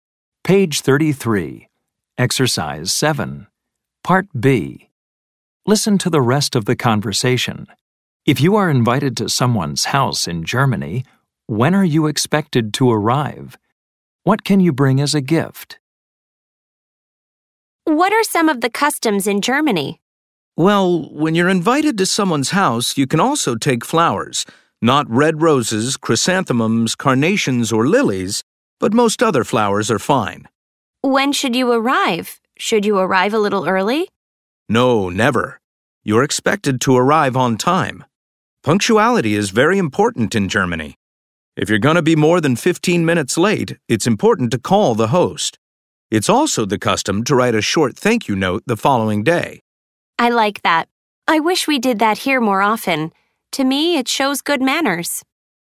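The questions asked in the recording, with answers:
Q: If you are invited to someone's house in Germany, when are you expected to arrive?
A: On time (never early)

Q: What can you bring as a gift?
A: Flowers (but not red roses, chrysanthemums, carnations or lilies)

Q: What are some of the customs in Germany?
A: Being on time; calling the host if you'll be more than 15 minutes late; writing a short thank-you note the next day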